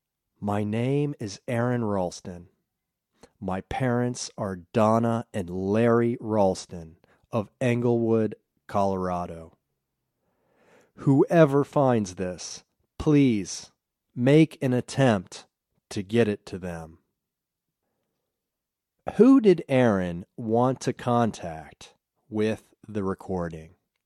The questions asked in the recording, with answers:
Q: Who did Aaron want to contact with the recording?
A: He wanted to contact his parents.